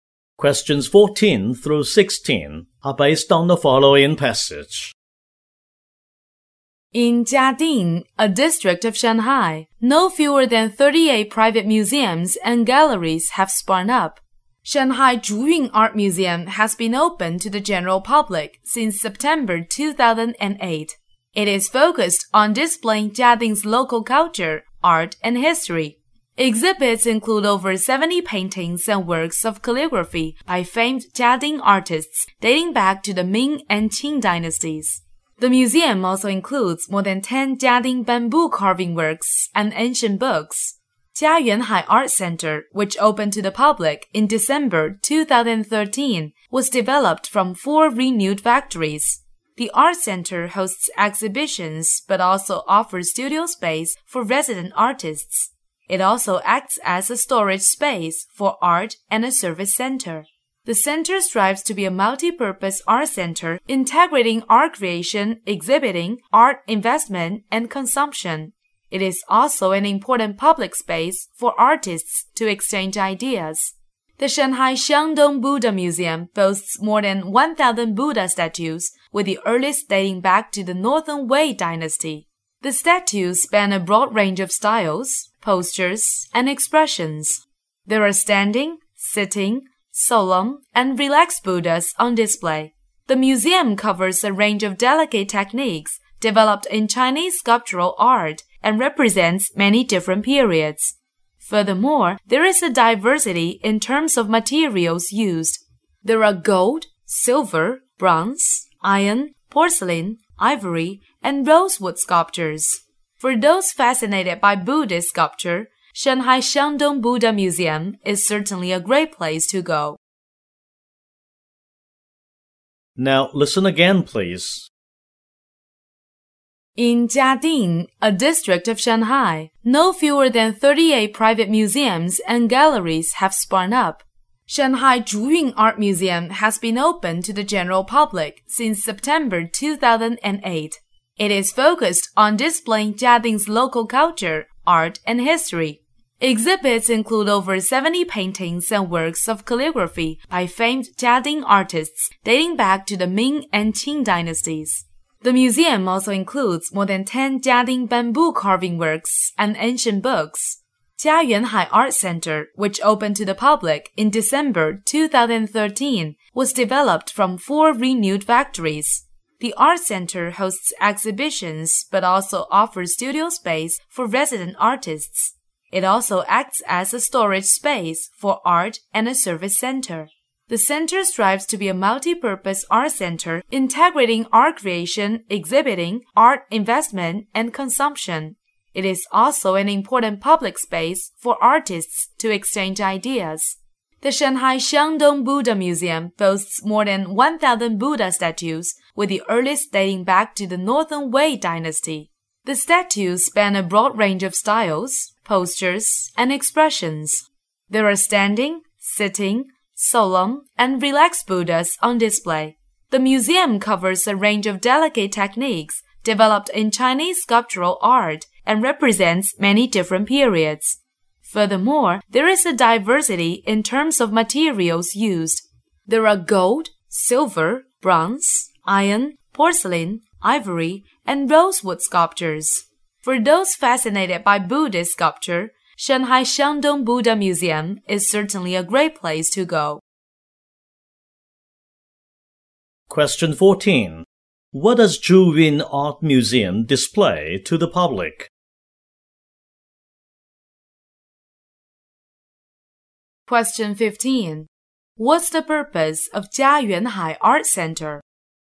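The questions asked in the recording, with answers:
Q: What does Zhuyun Art Museum display to the public?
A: Jiading's local culture, art and history

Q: What's the purpose of Jia Yuanhai Art Center?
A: To be a multi-purpose art center integrating art creation, exhibiting, investment and consumption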